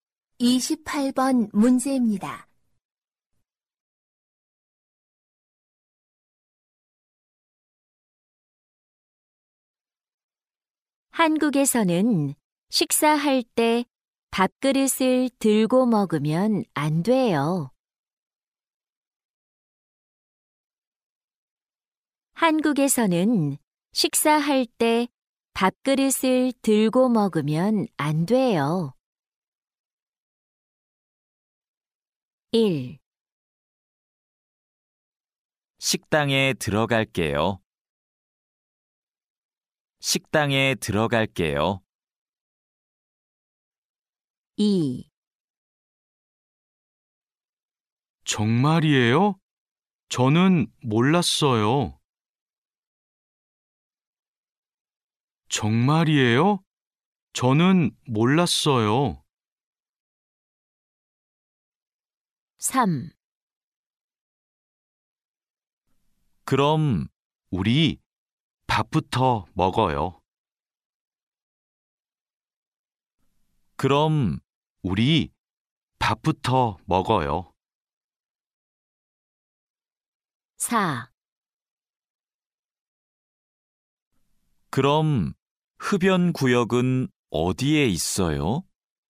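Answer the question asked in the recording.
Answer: 2: 정말이에요? 저는 몰랐어요.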